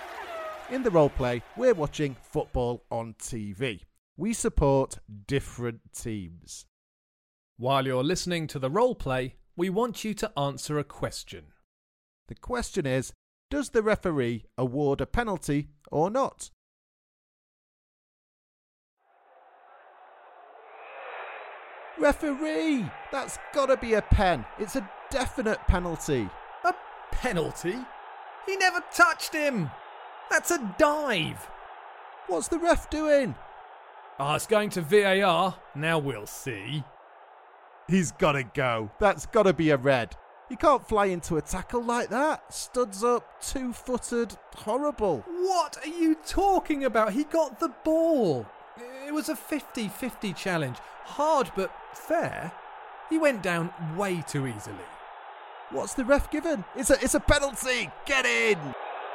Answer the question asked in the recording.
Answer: The answer is yes. The referee awarded a penalty.